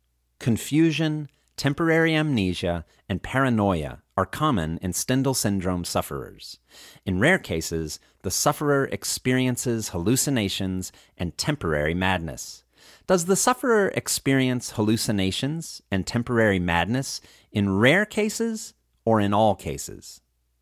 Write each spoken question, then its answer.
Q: Does the sufferer experience hallucinations and temporary madness in rare cases or in all cases?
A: The sufferer experiences hallucinations and temporary madness in rare cases.